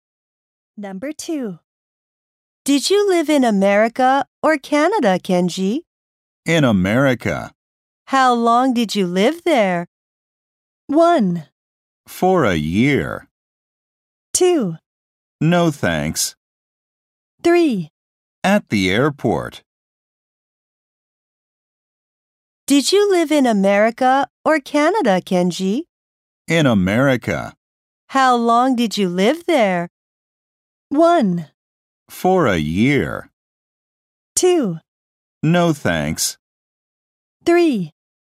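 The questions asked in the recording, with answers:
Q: How long did you live there?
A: 1: For a year.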